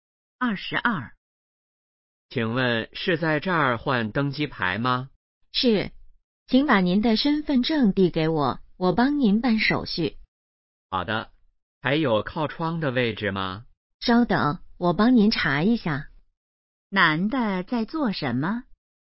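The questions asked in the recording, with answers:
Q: 男的在做什么?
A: 换登机牌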